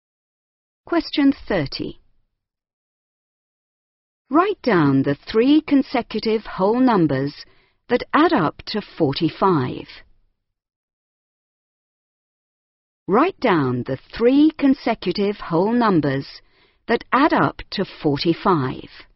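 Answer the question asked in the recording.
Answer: 14, 15, 16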